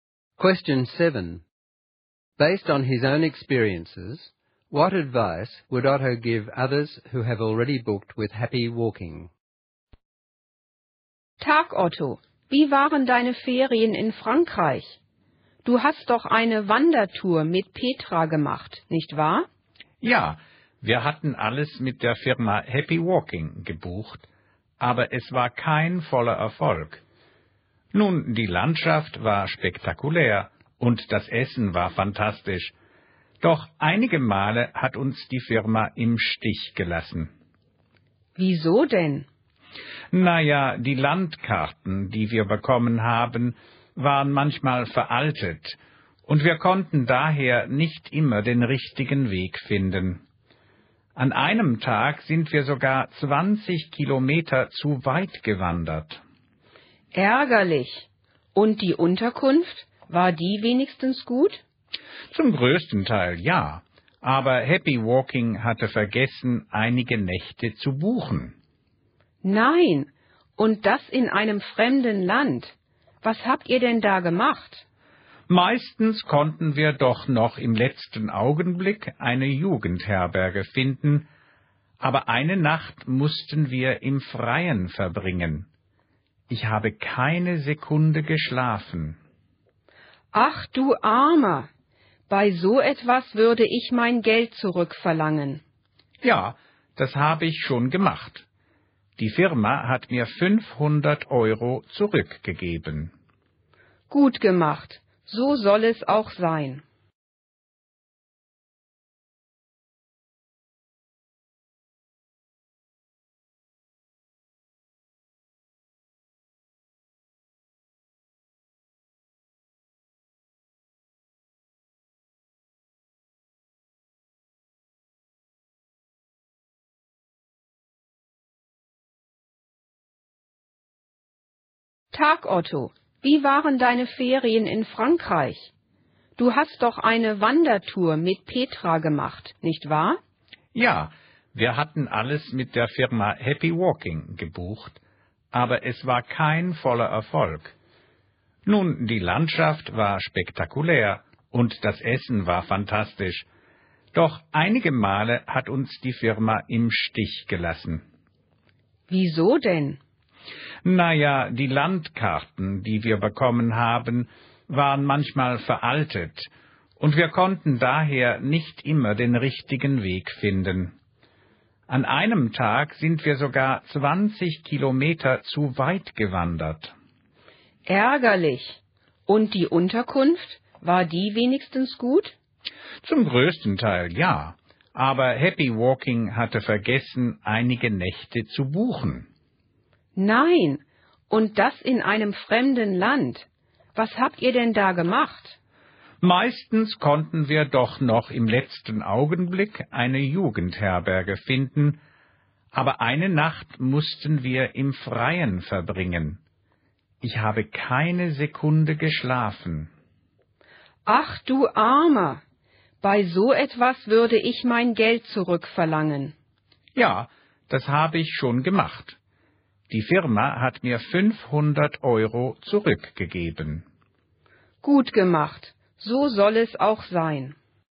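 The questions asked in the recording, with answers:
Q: Based on his own experiences, what advice would Otto give others who have already booked with Happy Walking?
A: Check that the maps are up to date and that all nights of accommodation are booked, and ask for a refund if things go wrong.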